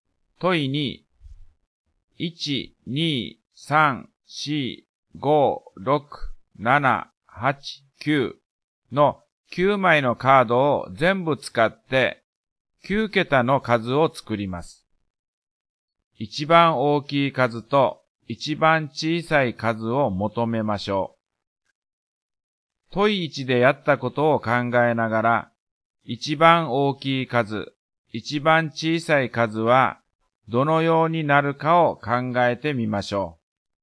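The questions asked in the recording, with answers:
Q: 一番大きい数と一番小さい数を求めましょう。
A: 一番大きい数は987654321、一番小さい数は123456789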